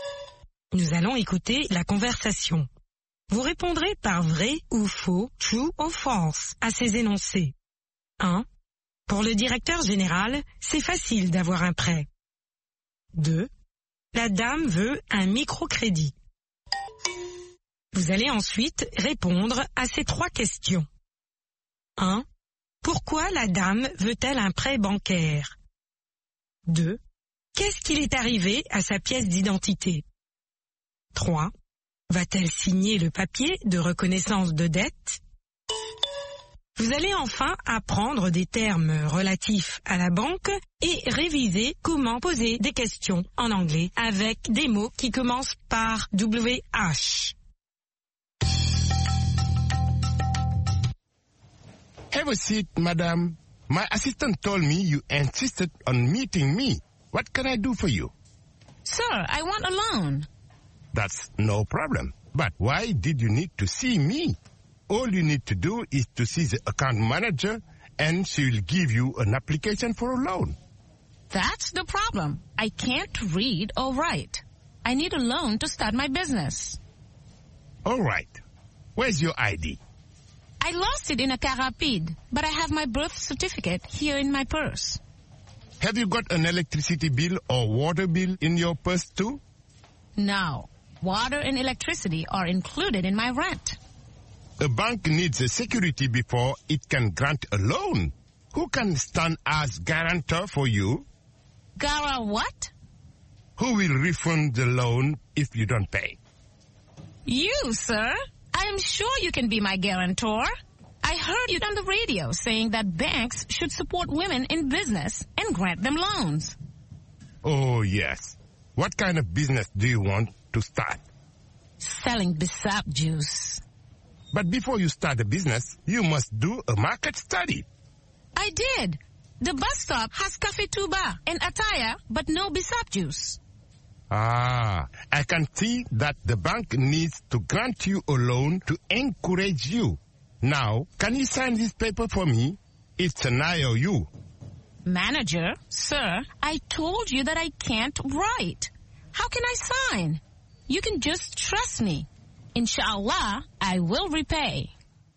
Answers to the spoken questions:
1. L'énoncé 1 est vrai. Pour le directeur général, c'est facile d'avoir un prêt.
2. L'énoncé 2 est faux. La dame veut un microcrédit.
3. Pour commencer son propre commerce.
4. Elle l'a perdue.
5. Non.